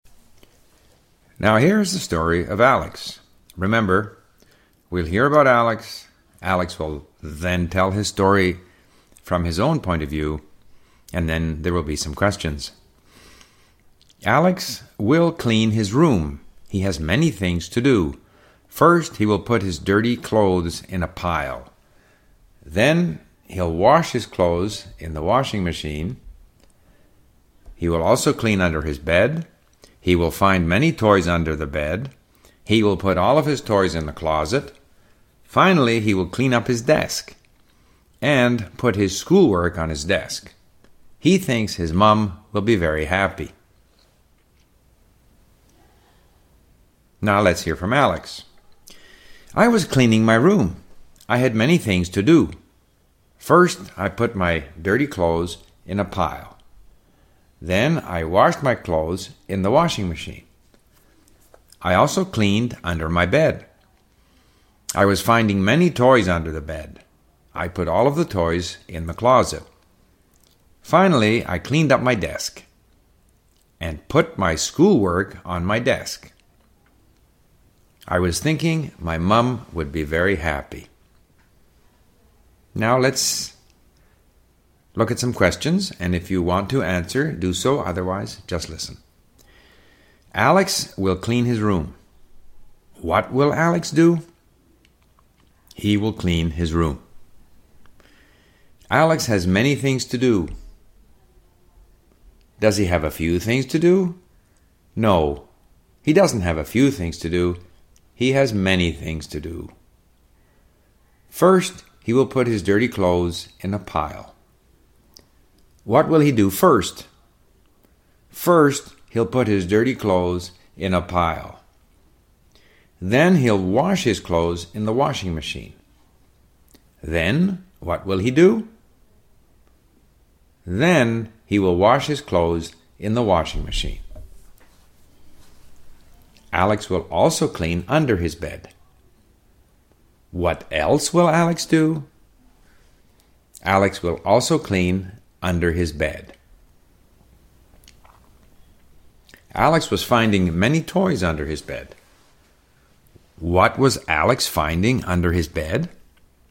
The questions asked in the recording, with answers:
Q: What was Alex finding under his bed?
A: He was finding many toys under his bed.